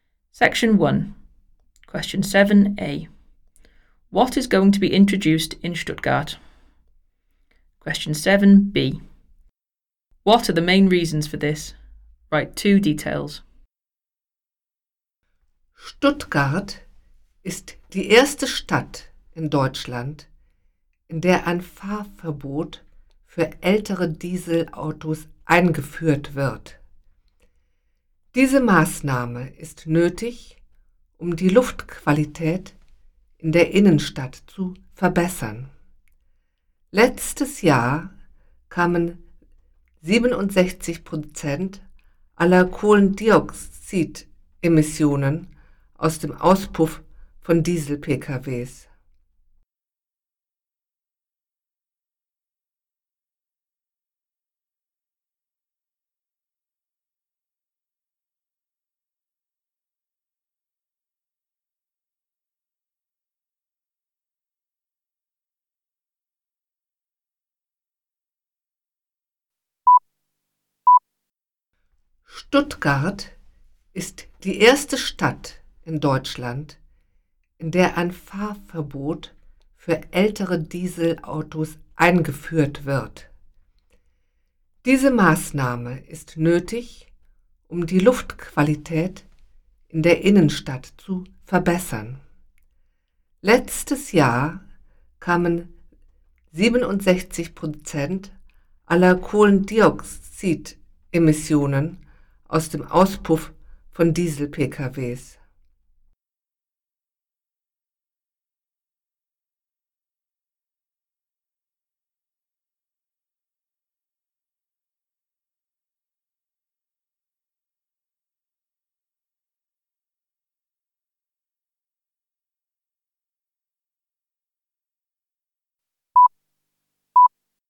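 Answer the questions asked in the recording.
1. A driving ban for older diesel cars
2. To improve air quality in the city centre; 67% of CO2 emissions came from diesel cars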